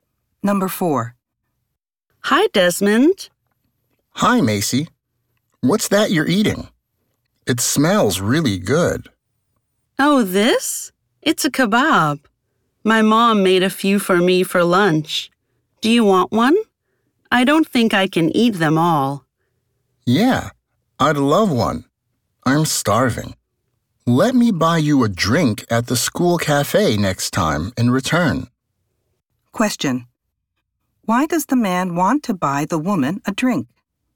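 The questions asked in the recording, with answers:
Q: why does the man want to buy the woman a drink?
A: To thank her for giving him one of her kebabs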